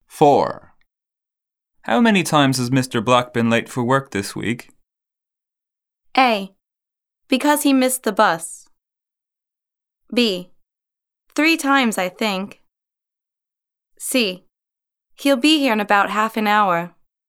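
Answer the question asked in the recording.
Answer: B: 3 times, I think.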